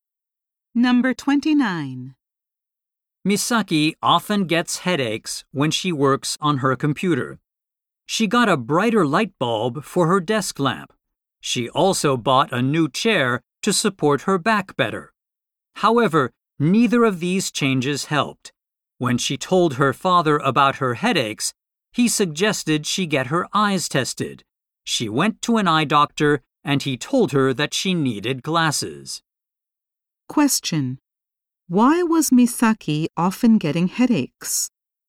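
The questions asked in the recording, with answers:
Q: Why was Misaki often getting headaches?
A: She needed glasses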